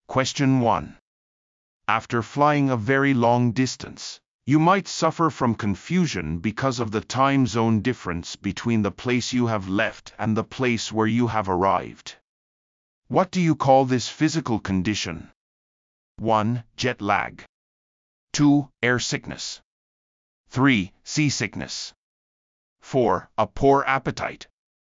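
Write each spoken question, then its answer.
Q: What do you call this physical condition?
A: 1: Jet lag.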